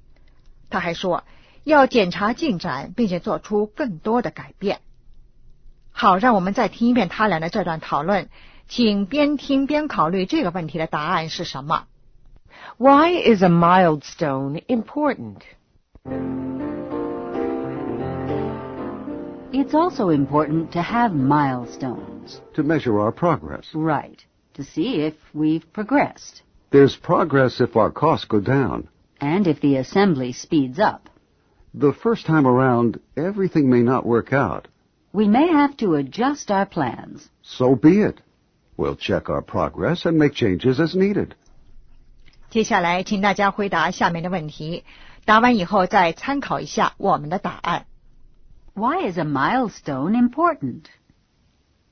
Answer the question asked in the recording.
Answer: To measure progress.